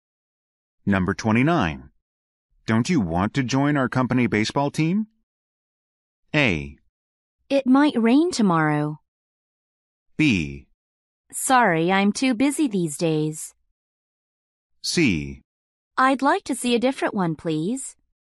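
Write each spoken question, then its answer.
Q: Don't you want to join our company baseball team?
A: B: Sorry, I'm too busy these days.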